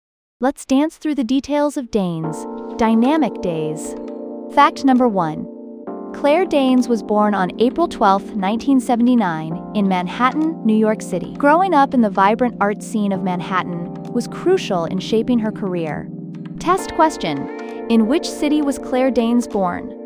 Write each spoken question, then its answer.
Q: in which city was Claire Danes born?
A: New York City.